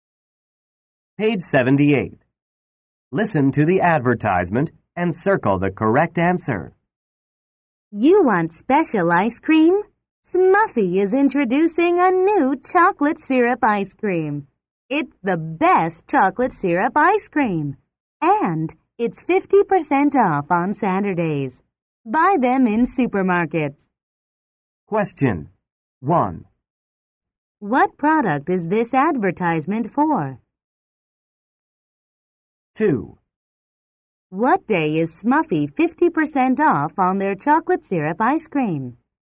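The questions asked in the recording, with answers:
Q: What product is this advertisement for?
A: Chocolate syrup ice cream

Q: What day is Smuffy 50% off on their chocolate syrup ice cream?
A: Saturday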